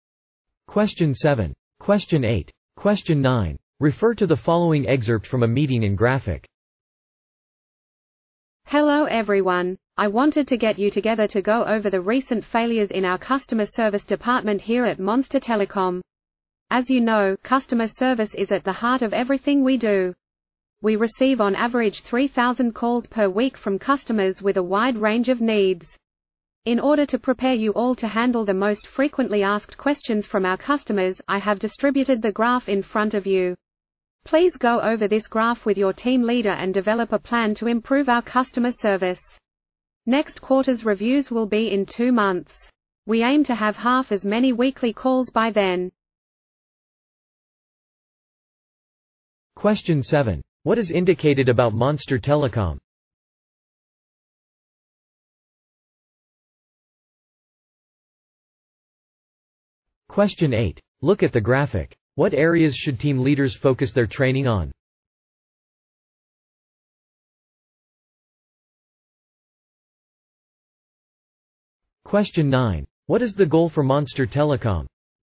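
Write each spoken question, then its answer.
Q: What is the goal for Monster Telecom?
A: To cut the number of weekly calls in half within two months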